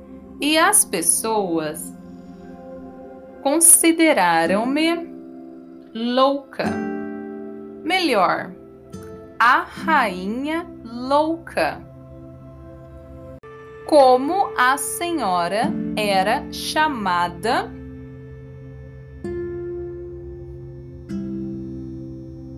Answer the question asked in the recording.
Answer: Ela era chamada de louca, a rainha louca.